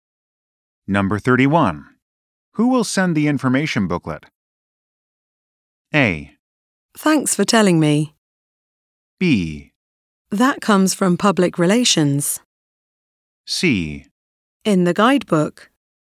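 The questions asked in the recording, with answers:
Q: Who will send the information booklet?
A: B: That comes from public relations.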